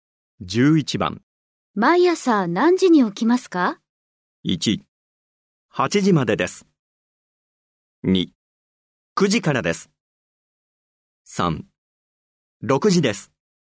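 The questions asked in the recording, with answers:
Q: 毎朝何時に起きますか?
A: 3: 6時です。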